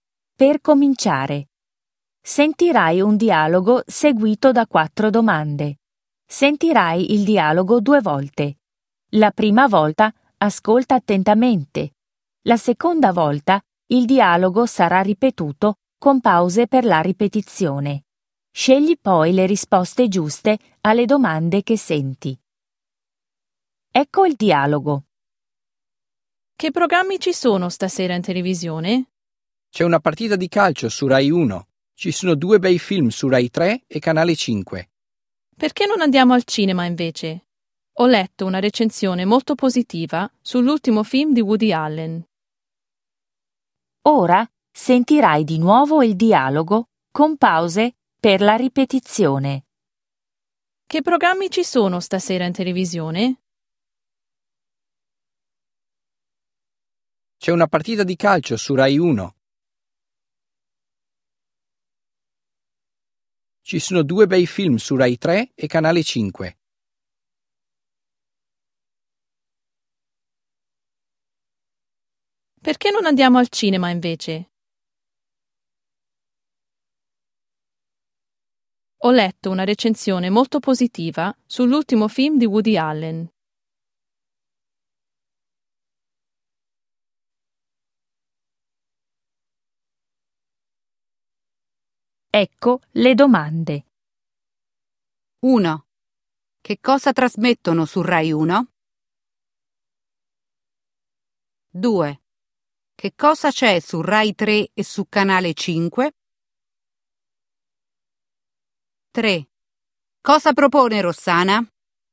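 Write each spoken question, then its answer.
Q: Che cosa trasmettono su Rai 1?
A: una partita di calcio

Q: Che cosa c'è su Rai 3 e su Canale 5?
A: due bei film

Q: Cosa propone Rossana?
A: di andare al cinema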